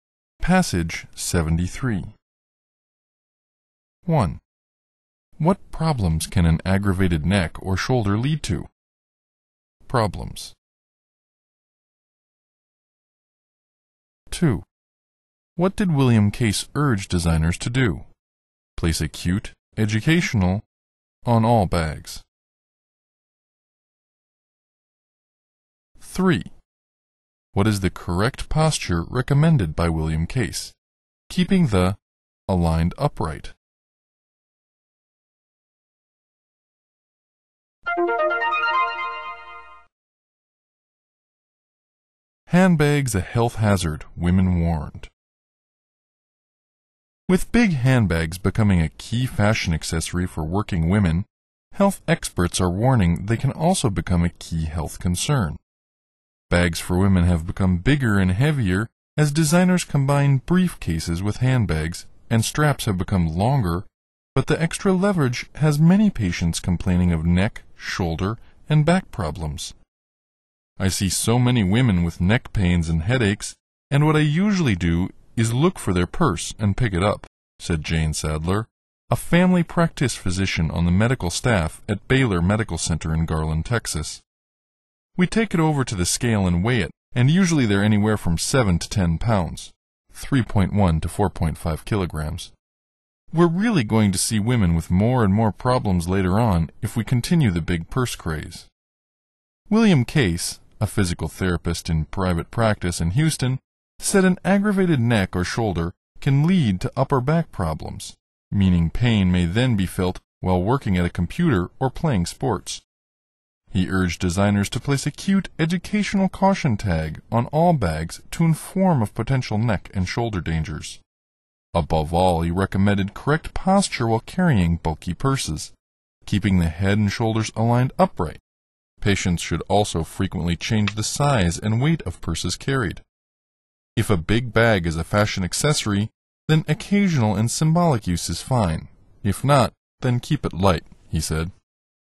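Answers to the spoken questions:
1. Upper back problems
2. Place a cute educational caution tag on all bags
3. Keeping the head and shoulders aligned upright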